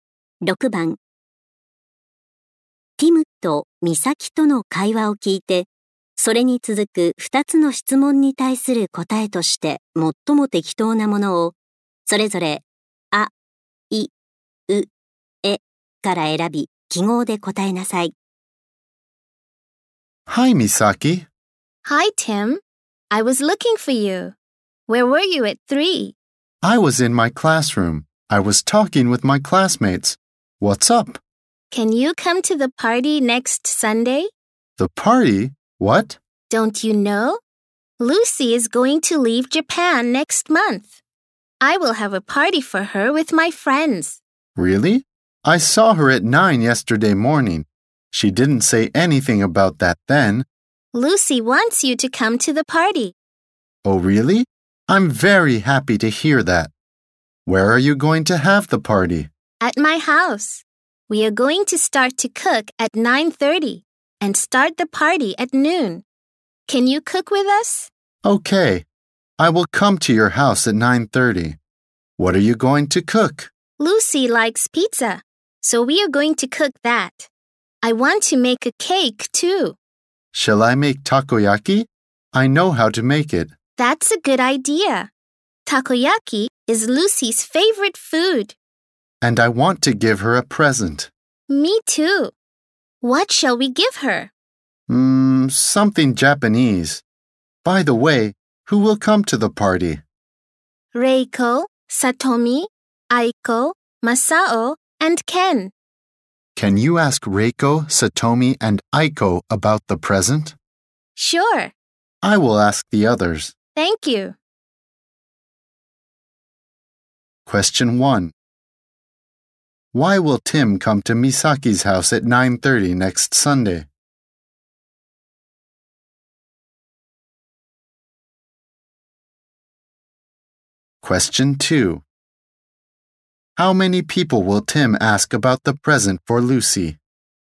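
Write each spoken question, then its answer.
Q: Why will Tim come to Misaki's house at 9:30 next Sunday?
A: To cook for Lucy's party with Misaki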